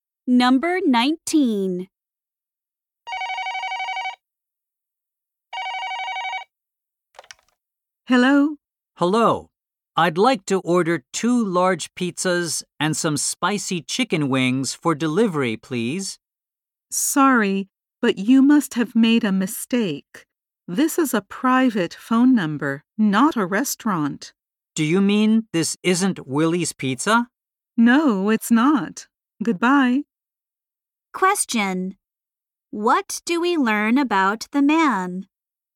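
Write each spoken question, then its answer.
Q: What do we learn about the man?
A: He called the wrong number.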